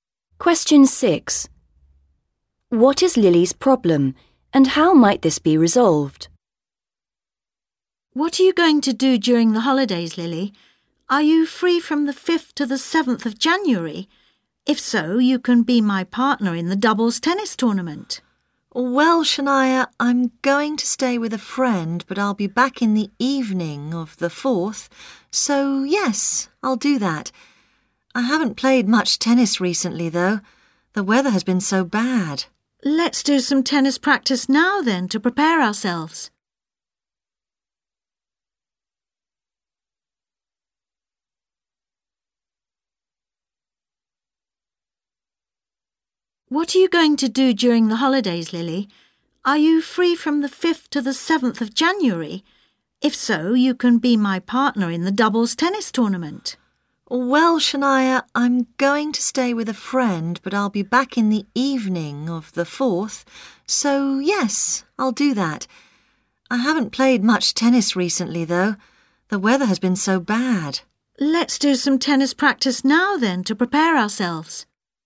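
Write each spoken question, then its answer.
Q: What is Lily's problem, and how might this be resolved?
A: She hasn't played much tennis recently; they can practise now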